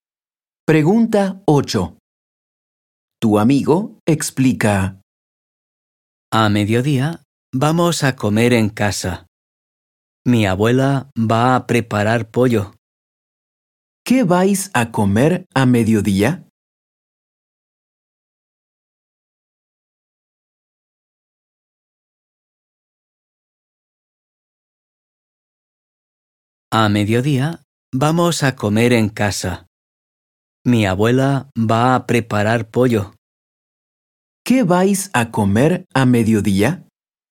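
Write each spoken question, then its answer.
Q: ¿Qué vais a comer a mediodía?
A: Pollo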